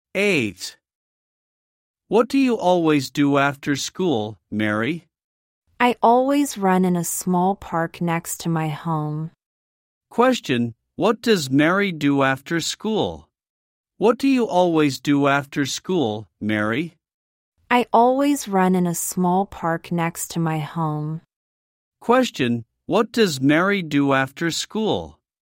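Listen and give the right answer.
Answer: She runs in a small park next to her home.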